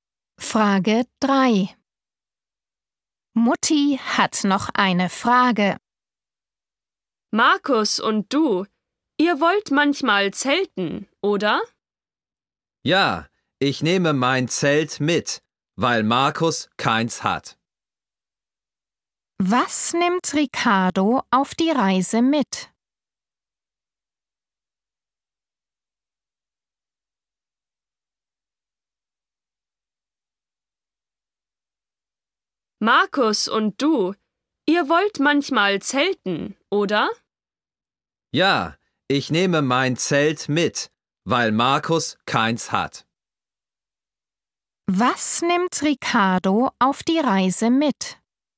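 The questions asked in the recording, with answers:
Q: Was nimmt Ricardo auf die Reise mit?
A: sein Zelt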